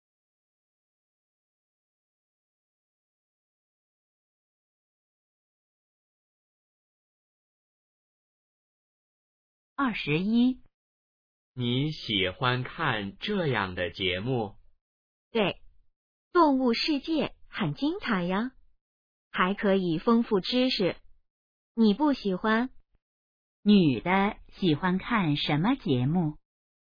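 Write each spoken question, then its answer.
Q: 女的喜欢看什么节目?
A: 动物世界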